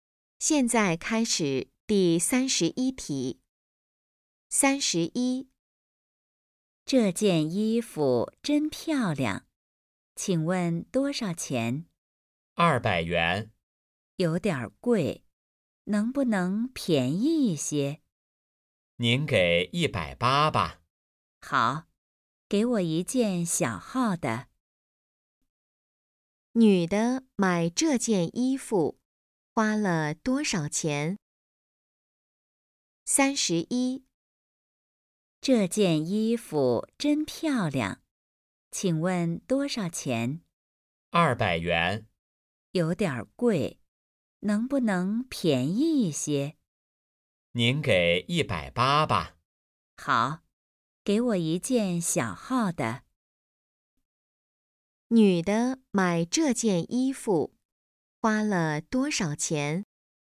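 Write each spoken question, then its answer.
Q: 女的买这件衣服花了多少钱?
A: 180元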